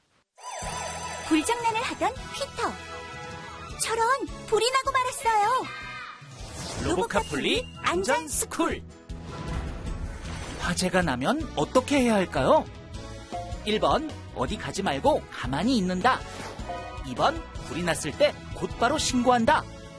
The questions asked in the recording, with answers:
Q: 화재가 나면 어떻게 해야 할까요?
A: 정답은 2번. 불이 났을 때는 당황하지 말고 곧바로 119에 신고해야 해요.